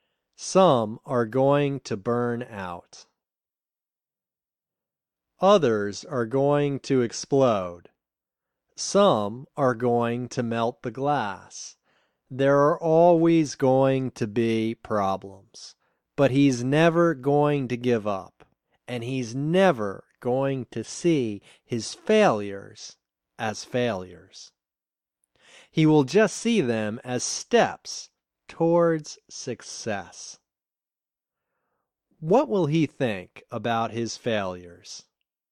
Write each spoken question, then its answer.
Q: What will he think about his failures?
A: He will see them as steps towards success.